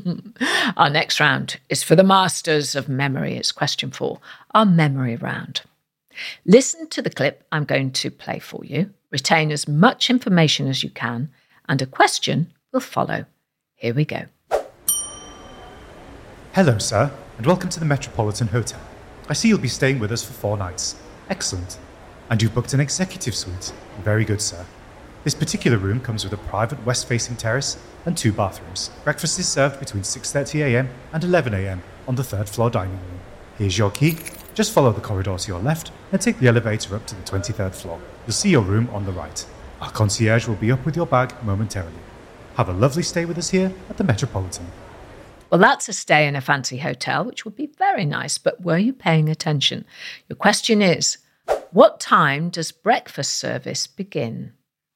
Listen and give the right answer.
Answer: And the answer was 6:30 a.m., 6:30.